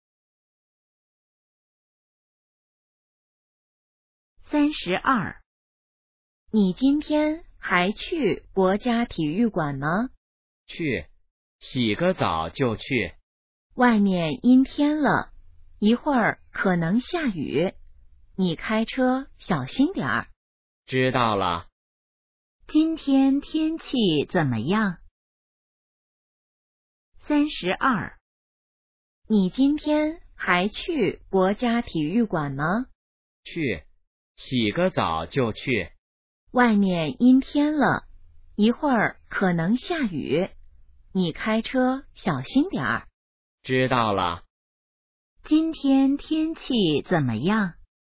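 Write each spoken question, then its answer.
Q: 今天天气怎么样?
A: 阴天,可能下雨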